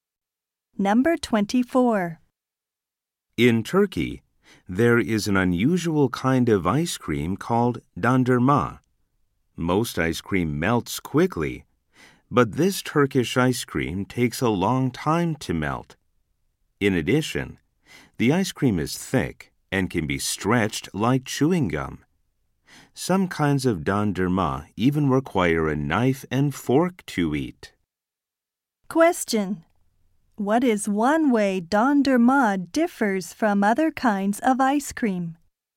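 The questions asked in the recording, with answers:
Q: What is one way dondurma differs from other kinds of ice cream?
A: It takes a long time to melt.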